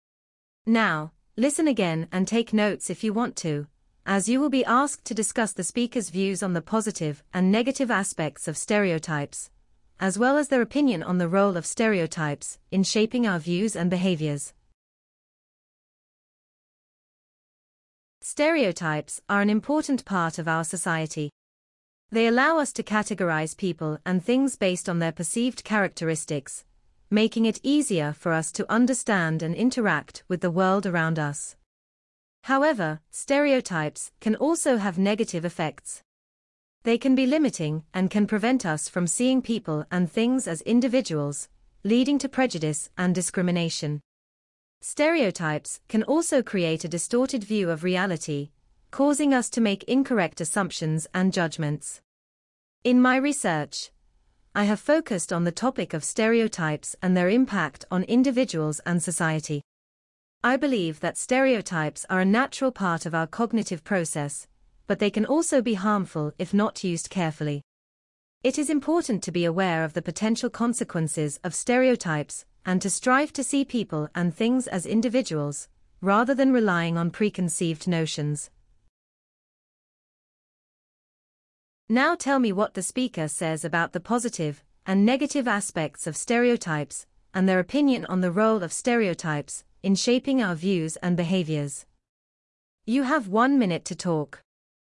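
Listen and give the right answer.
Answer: Good: they help us categorize and understand the world. Bad: they limit us and lead to prejudice, discrimination and wrong assumptions. Opinion: they are a natural part of thinking but can harm, so we should be aware of them and see people as individuals.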